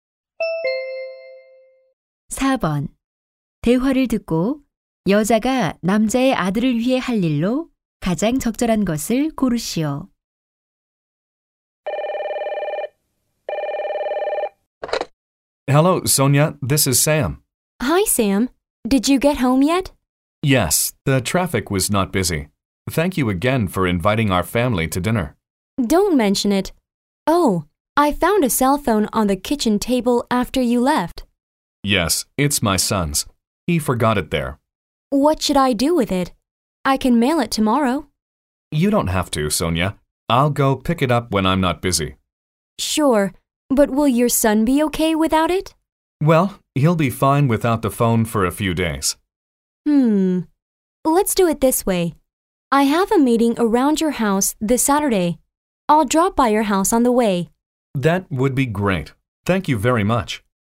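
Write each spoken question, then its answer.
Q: 대화를 듣고 여자가 남자의 아들을 위해 할 일로 가장 적절한 것을 고르시오.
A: 토요일에 남자의 집에 들러 휴대폰을 가져다주기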